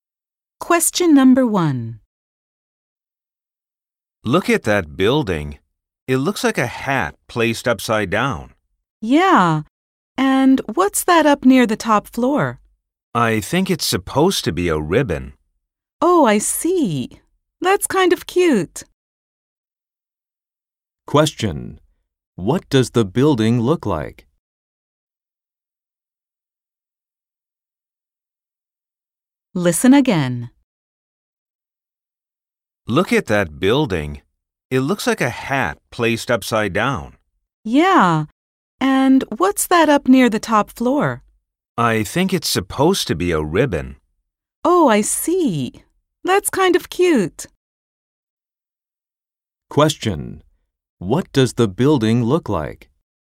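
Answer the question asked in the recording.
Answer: Like an upside-down hat with a ribbon near the top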